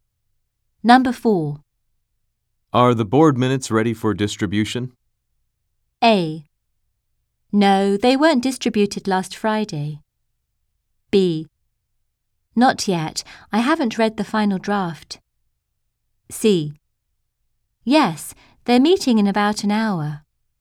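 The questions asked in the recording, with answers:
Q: Are the board minutes ready for distribution?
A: B: Not yet. I haven't read the final draft.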